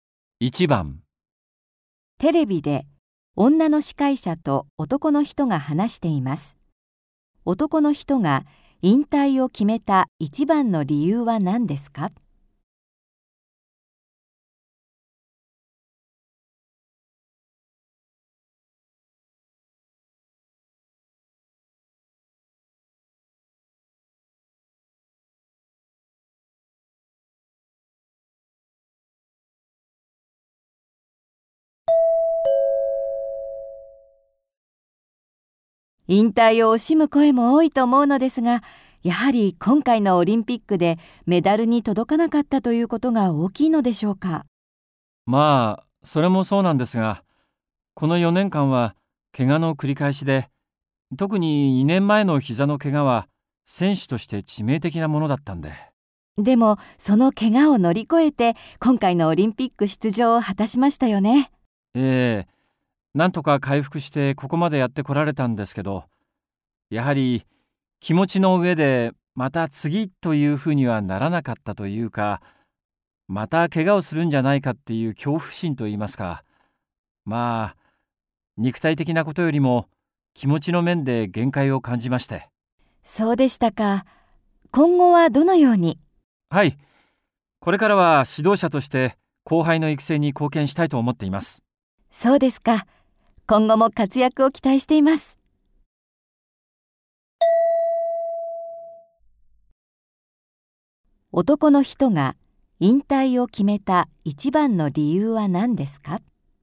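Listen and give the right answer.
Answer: また怪我をするのではないかという恐怖心から、気持ちの面で限界を感じたから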